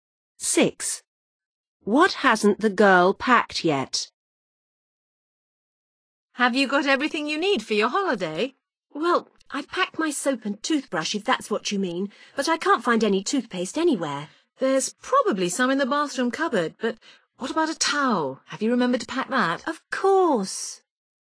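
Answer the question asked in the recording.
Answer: toothpaste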